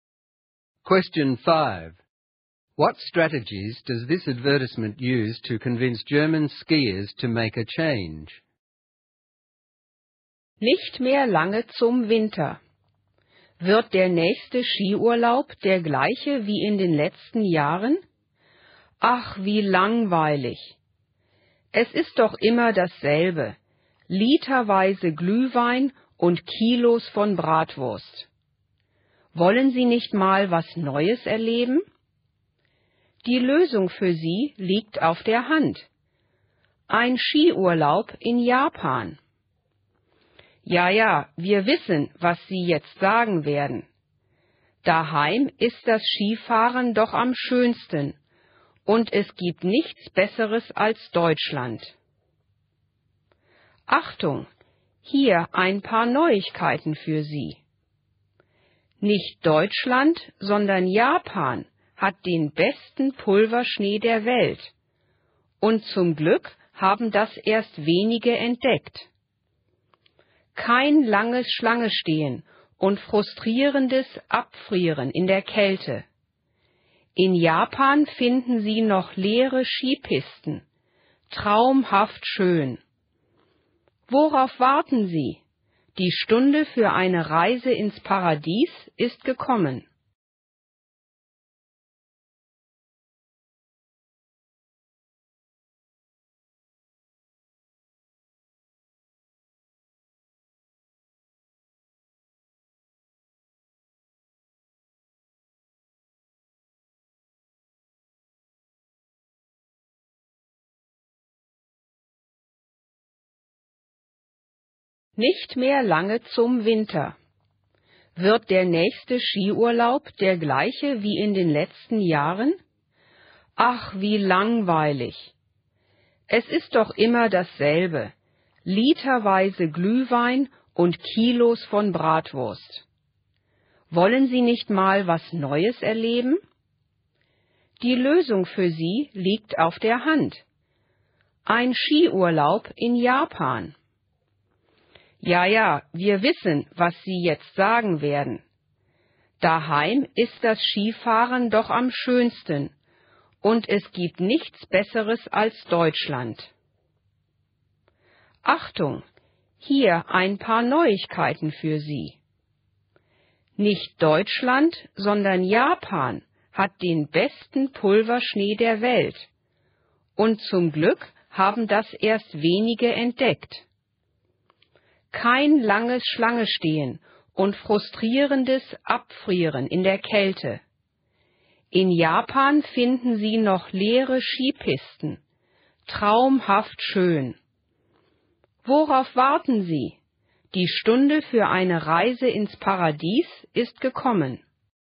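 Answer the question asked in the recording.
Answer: It calls ski holidays in Germany boring and always the same, predicts and answers their objections, and promises something new: Japan's best powder snow, no queues or freezing, and empty slopes (a 'paradise').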